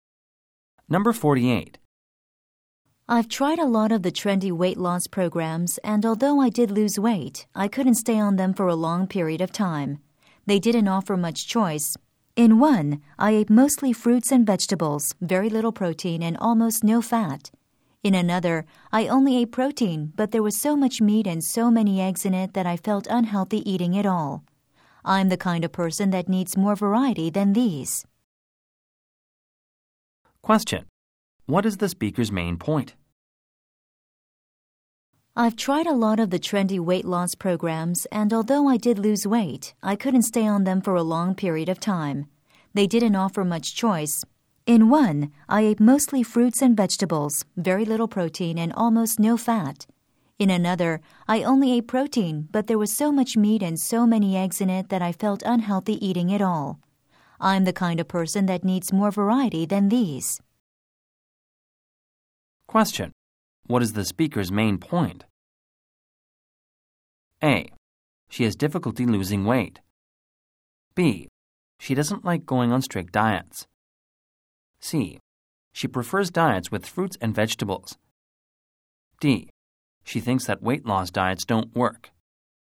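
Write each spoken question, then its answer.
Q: What is the speaker's main point?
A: B: She doesn't like going on strict diets.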